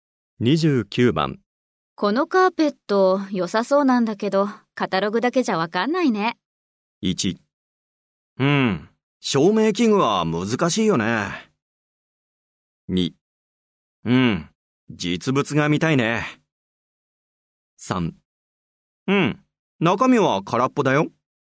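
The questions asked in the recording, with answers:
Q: このカーペット、良さそうなんだけど、カタログだけじゃわかんないね。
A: 2: うん、実物が見たいね。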